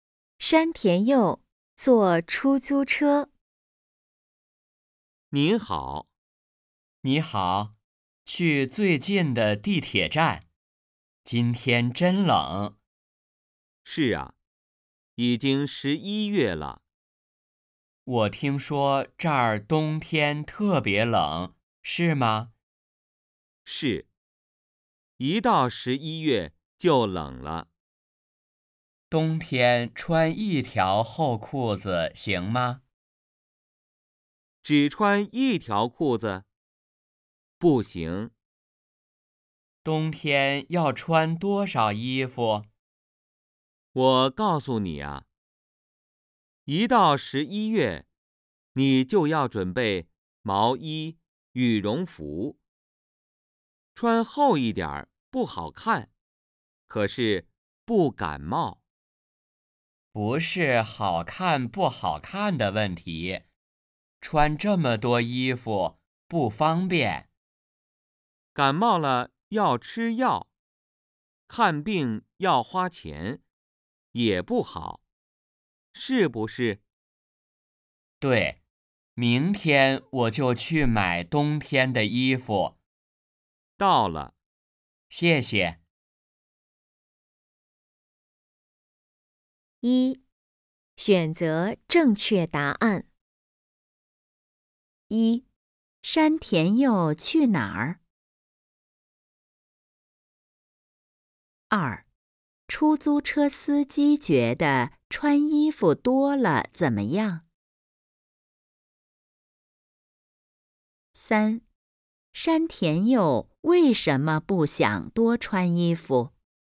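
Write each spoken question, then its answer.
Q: 山田佑去哪儿?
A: 最近的地铁站

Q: 出租车司机觉得穿衣服多了怎么样?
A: 不好看,可是不感冒

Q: 山田佑为什么不想多穿衣服?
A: 穿这么多衣服不方便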